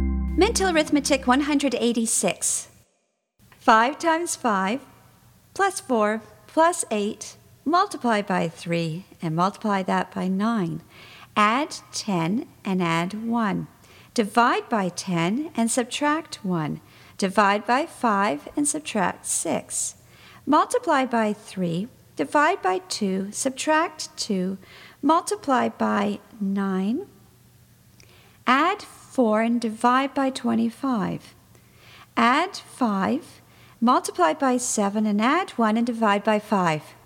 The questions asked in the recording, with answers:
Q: 5 times 5, plus 4, plus 8, multiply by 3, and multiply that by 9. Add 10 and add 1. Divide by 10 and subtract 1. Divide by 5 and subtract 6. Multiply by 3, divide by 2, subtract 2, multiply by 9. Add 4 and divide by 25. Add 5, multiply by 7 and add 1 and divide by 5.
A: And the answer is 17.